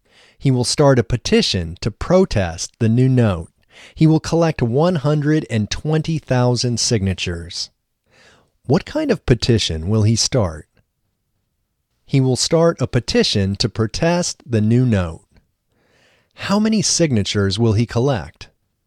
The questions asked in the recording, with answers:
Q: How many signatures will he collect?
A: He will collect 120,000 signatures.